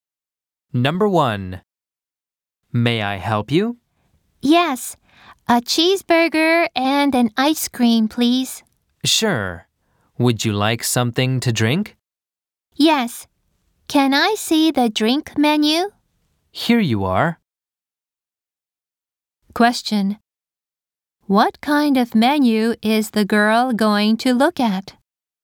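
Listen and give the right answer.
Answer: The drink menu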